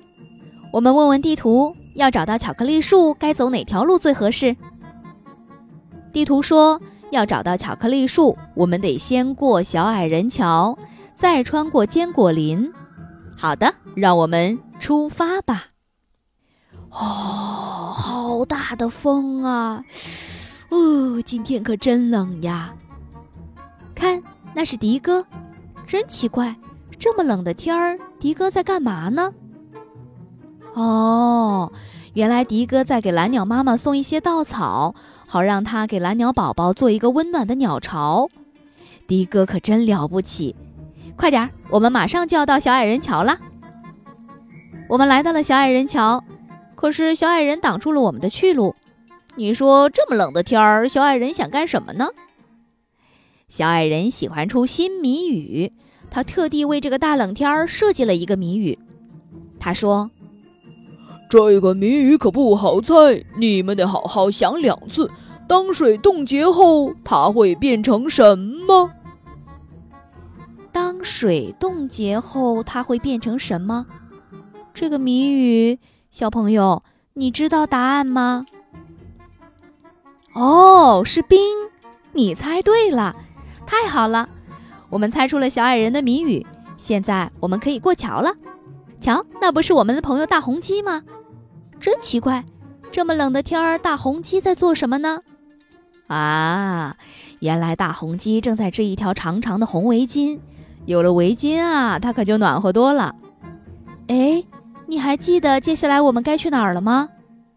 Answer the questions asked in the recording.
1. 哦,是冰,你猜对了。
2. 对了,坚果林。